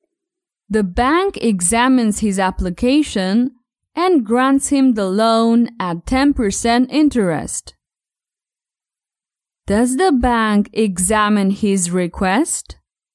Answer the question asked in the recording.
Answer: Yes, the bank examines his request.